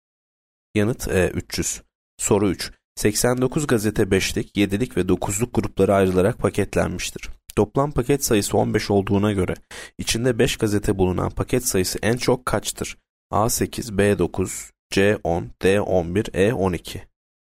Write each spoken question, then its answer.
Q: Toplam paket sayısı 15 olduğuna göre içinde 5 gazete bulunan paket sayısı en çok kaçtır?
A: Yanıt D 11.